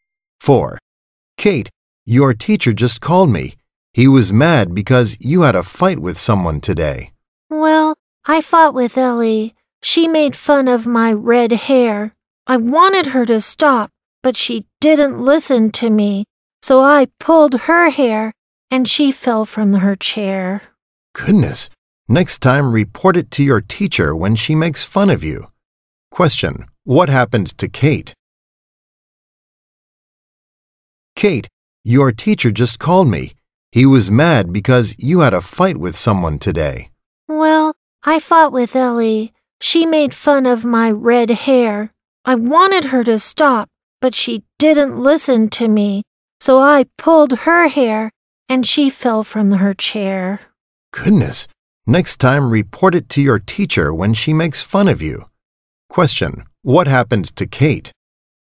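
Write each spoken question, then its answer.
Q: What happened to Kate?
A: She had a fight with Ellie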